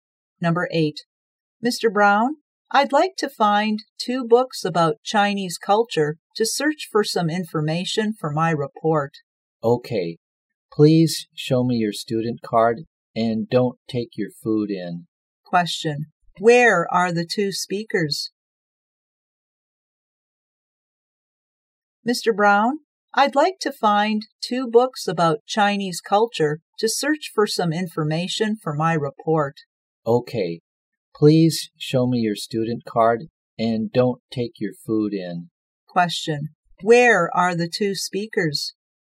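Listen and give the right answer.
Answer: In a library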